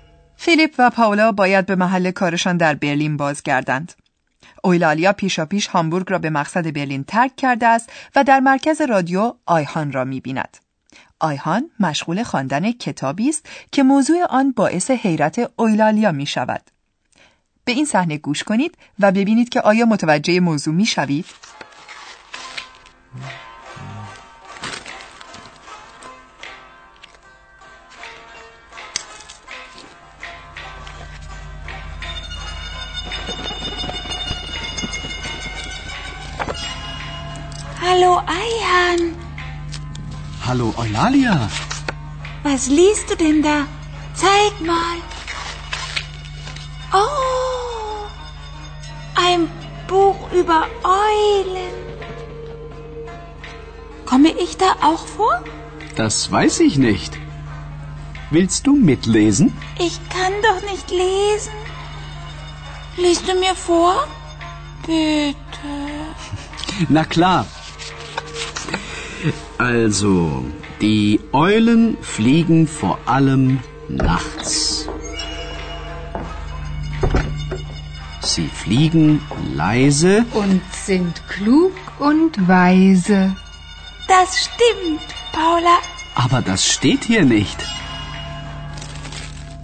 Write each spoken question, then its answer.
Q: به این صحنه گوش کنید و ببینید که آیا متوجه موضوع می شوید؟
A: آیخان سرگرم خواندن کتابی است.